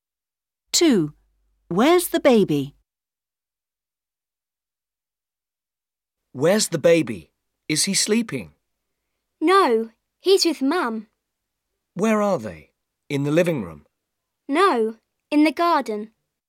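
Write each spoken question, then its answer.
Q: Where's the baby?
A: In the garden with Mum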